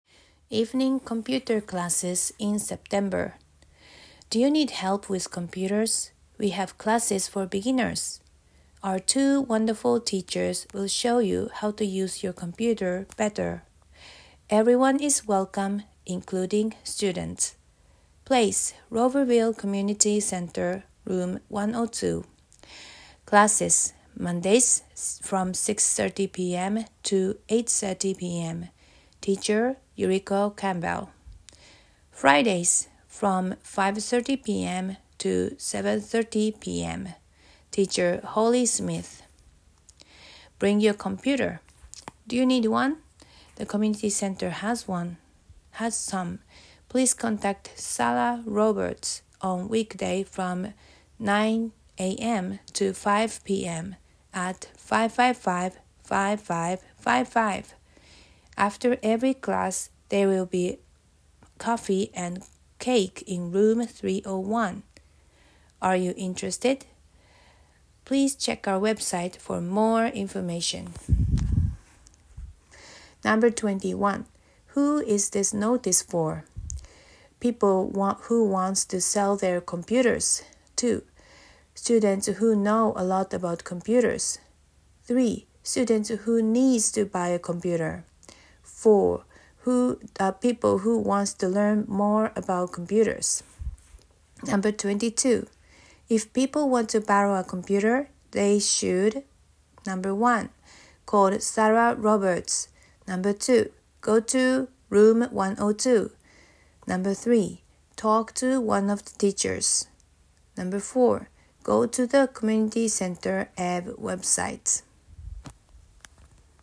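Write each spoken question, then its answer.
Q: Who is this notice for?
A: 4: People who wants to learn more about computers.

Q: If people want to borrow a computer, they should.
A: 1: Call Sarah Roberts.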